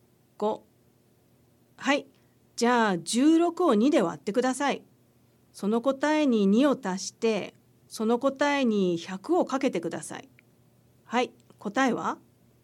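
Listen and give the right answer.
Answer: 1000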